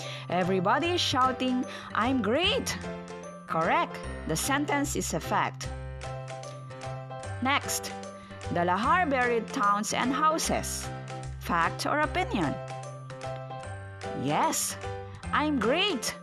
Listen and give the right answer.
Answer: The sentence also is a fact.